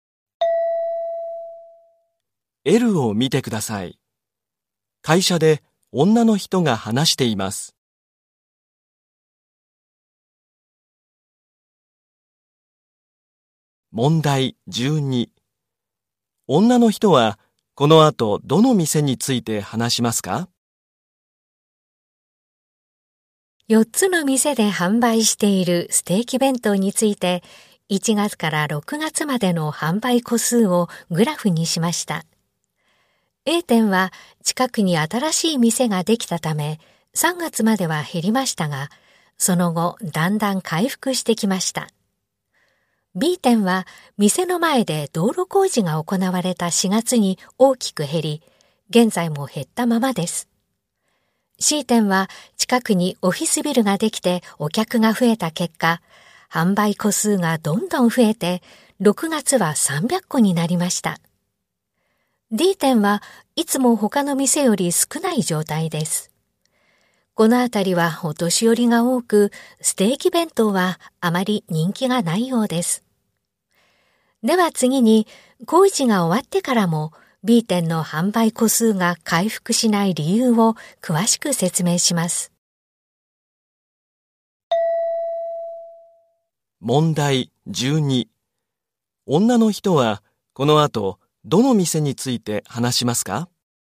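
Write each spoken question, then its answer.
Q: 女の人はこの後どの店について話しますか?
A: B店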